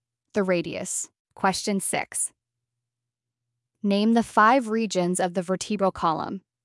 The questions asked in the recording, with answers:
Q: Name the 5 regions of the vertebral column.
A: Cervical, thoracic, lumbar, sacrum, and coccyx.